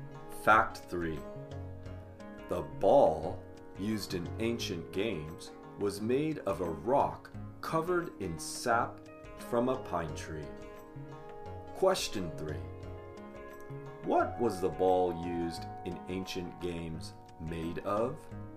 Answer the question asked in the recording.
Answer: The ball used in ancient games was made of a rock covered in sap from a pine tree.